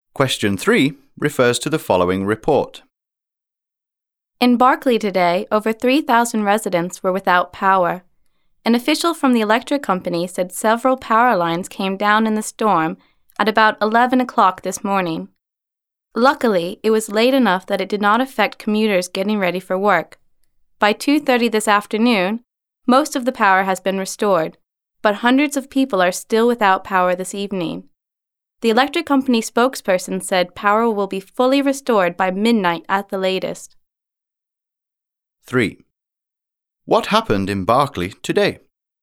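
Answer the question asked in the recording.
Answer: A storm brought down power lines, leaving over 3,000 residents without power.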